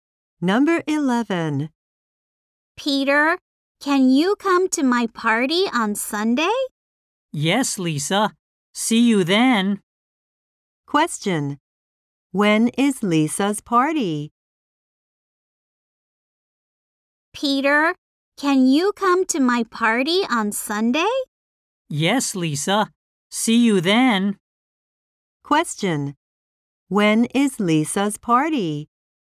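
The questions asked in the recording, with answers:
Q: When is Lisa's party?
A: On Sunday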